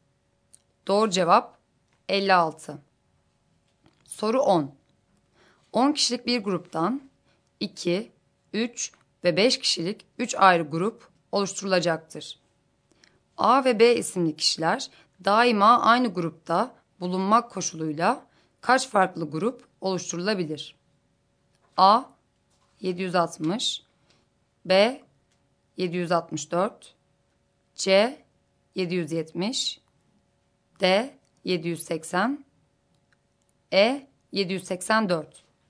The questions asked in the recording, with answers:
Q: A ve B isimli kişiler daima aynı grupta bulunmak koşuluyla kaç farklı grup oluşturulabilir?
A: Doğru cevap E şıkkı.